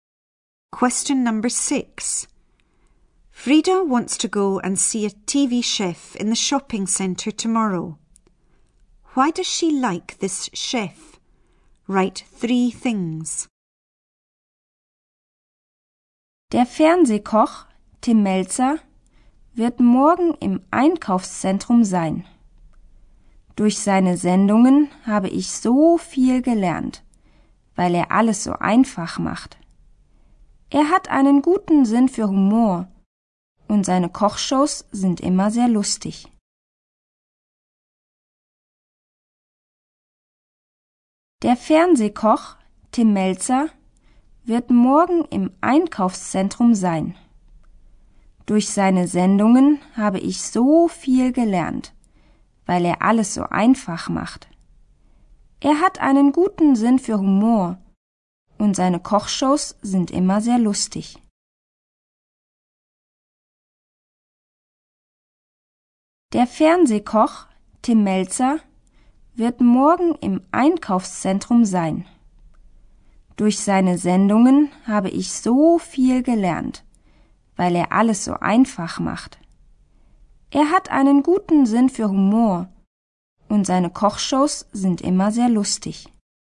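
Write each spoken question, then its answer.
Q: Why does she like this chef?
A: She has learned a lot because he makes everything so simple; he has a good sense of humour; his cooking shows are always very funny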